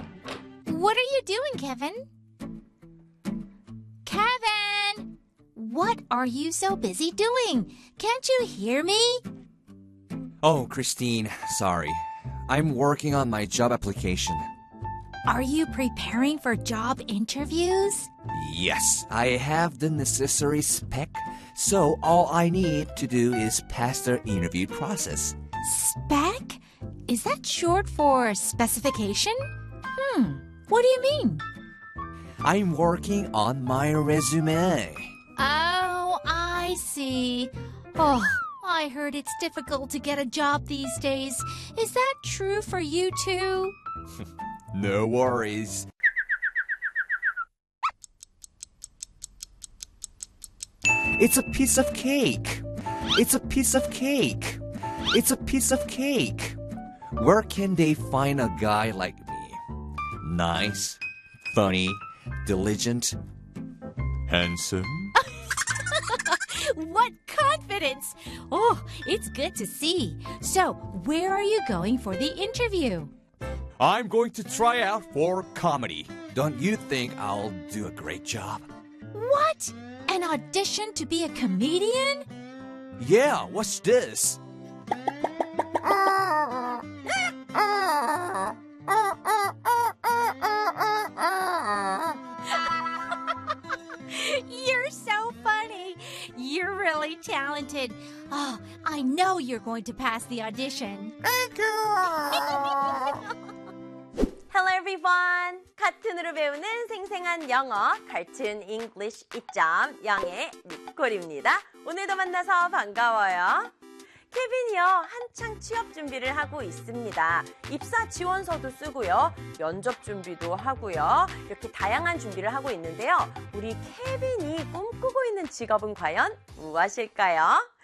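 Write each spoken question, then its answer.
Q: 우리 케빈이 꿈꾸고 있는 직업은 과연 무엇일까요?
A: 코미디언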